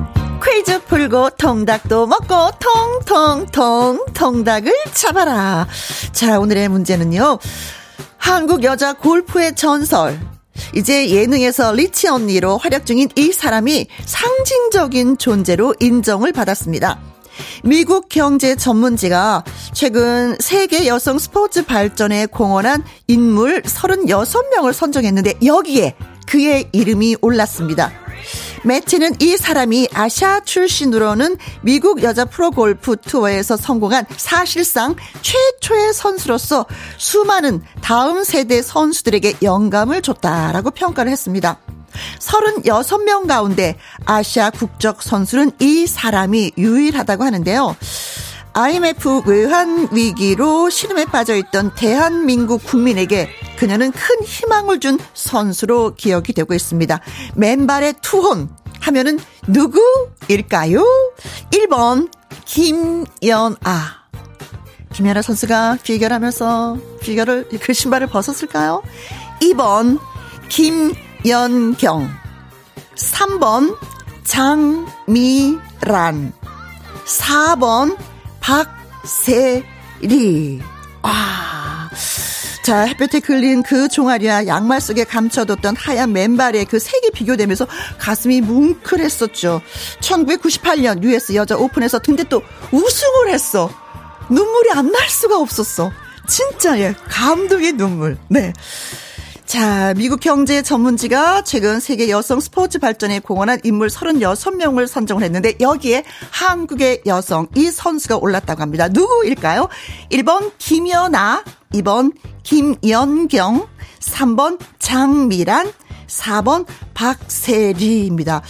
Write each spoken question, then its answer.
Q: 자, 미국 경제 전문지가 최근 세계 여성 스포츠 발전에 공헌한 인물 36명을 선정을 했는데 여기에 한국의 여성 이 선수가 올랐다고 합니다. 누구일까요?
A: 박세리!